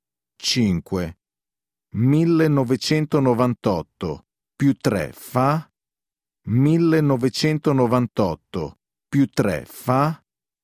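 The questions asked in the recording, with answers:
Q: 1998 più 3 fa?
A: 2001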